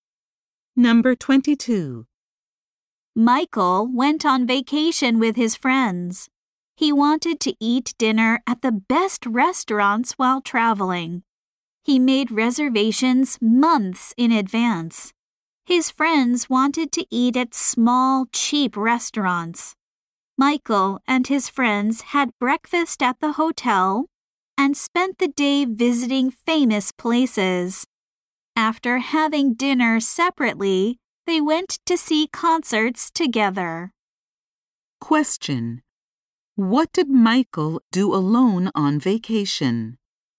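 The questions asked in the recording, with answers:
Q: What did Michael do alone on vacation?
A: He ate dinner at the best restaurants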